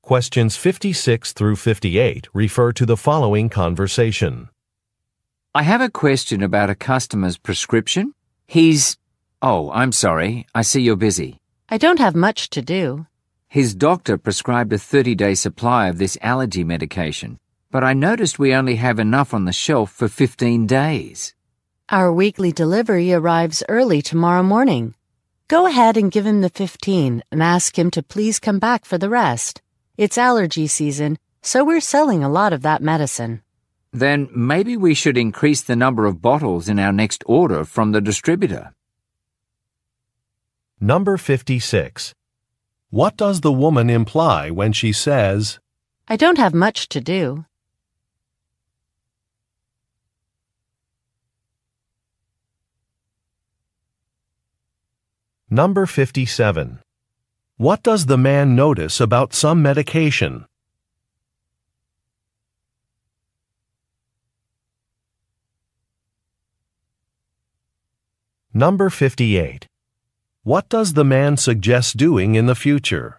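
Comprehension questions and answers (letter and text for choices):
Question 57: What does the e man notice about some medication?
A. It needs to be refrigerated.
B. It has expired.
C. The dosage has changed.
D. The supply is limited.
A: D. The supply is limited.

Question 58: What does the man suggest doing in the future?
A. Installing some shelves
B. Confirming with a doctor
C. Increasing an order amount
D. Recommending a different medication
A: C. Increasing an order amount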